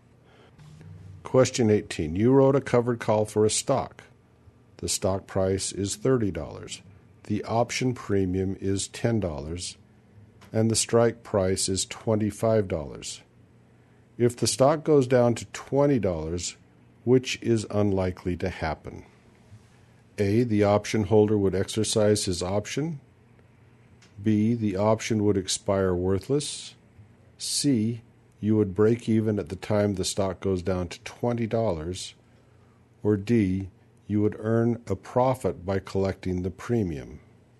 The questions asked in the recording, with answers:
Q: If the stock goes down to $20, which is unlikely to happen?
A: And the answer is A. And the answer is A, the option holder would exercise his option.